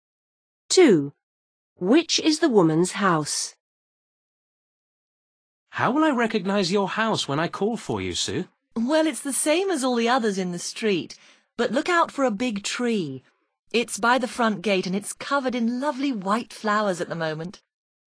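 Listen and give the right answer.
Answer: the one with a big tree with white flowers by the front gate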